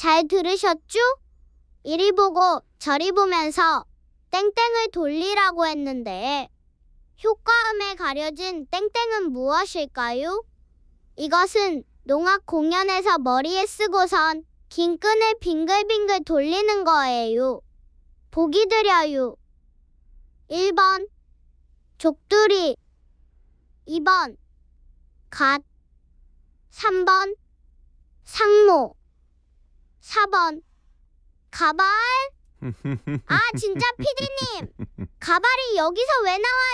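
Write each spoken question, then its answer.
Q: 이리 보고 저리 보면서 땡땡을 돌리라고 했는데 효과음에 가려진 땡땡은 무엇일까요?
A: 3: 상모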